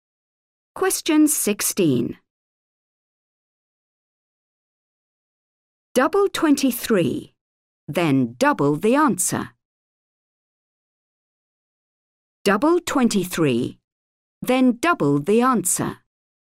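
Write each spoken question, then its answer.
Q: Double 23, then double the answer.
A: 92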